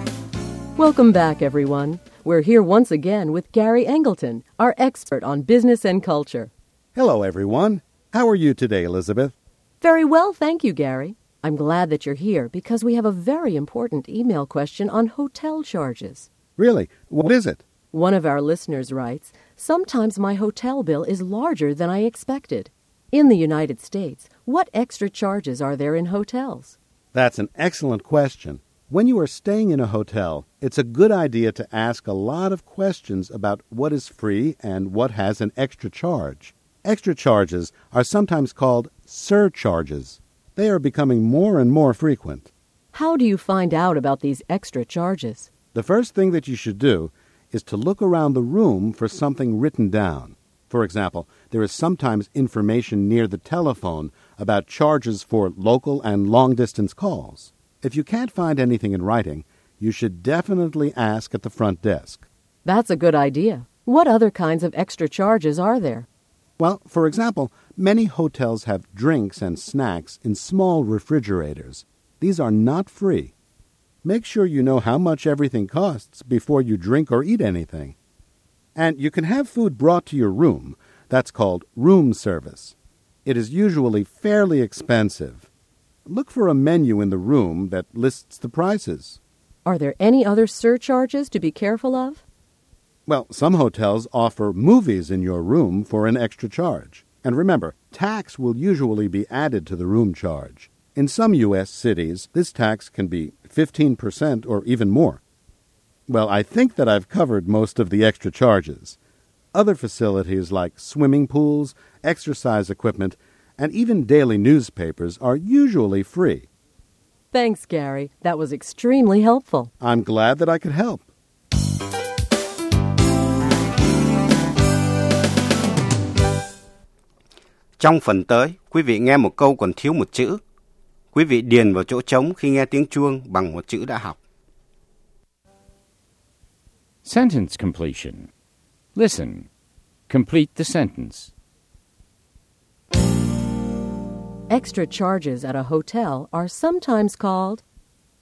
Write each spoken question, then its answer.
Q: Extra charges at a hotel are sometimes called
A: surcharges. They're called surcharges.